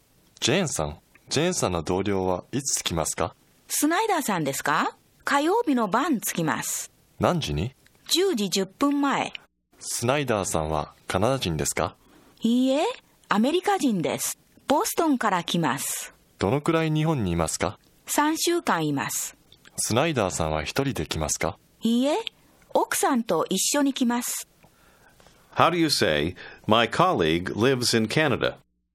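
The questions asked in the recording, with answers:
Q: ジェーンさんの同僚はいつ着きますか?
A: 火曜日の晩(10時10分前)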